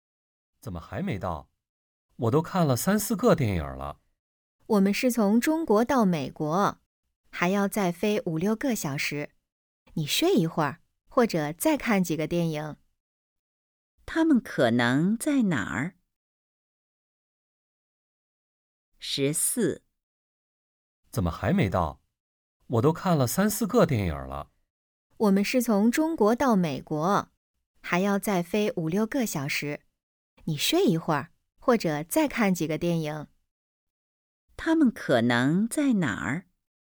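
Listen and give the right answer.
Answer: 飞机上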